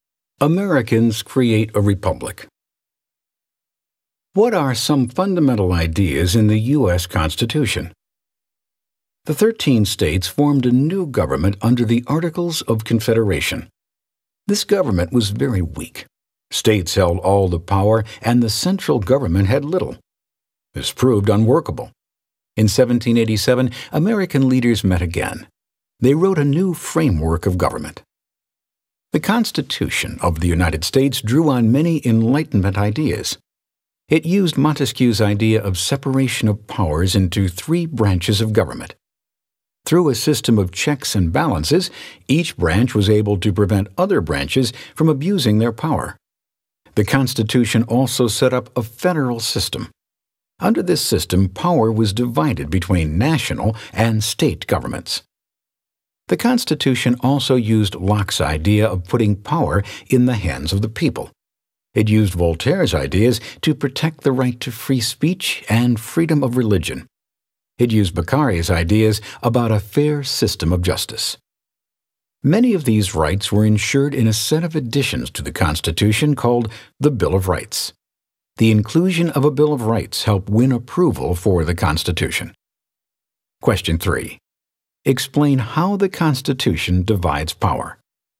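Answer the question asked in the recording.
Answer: It separates power into three branches with checks and balances, and divides power between national and state governments (a federal system).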